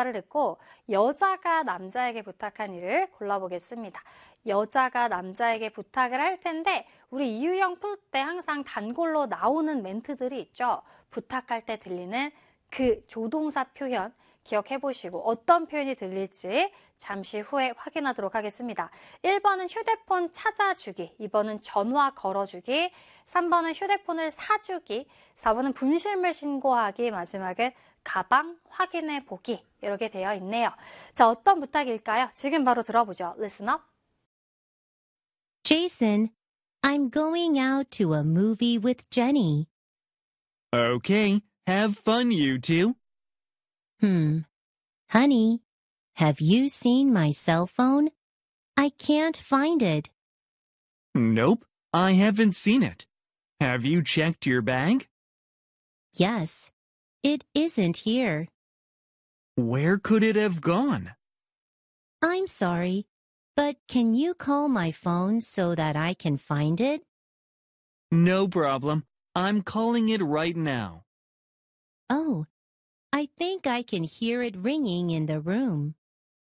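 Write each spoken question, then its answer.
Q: 대화를 듣고 여자가 남자에게 부탁한 일을 골라보겠습니다.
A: 2: 전화 걸어주기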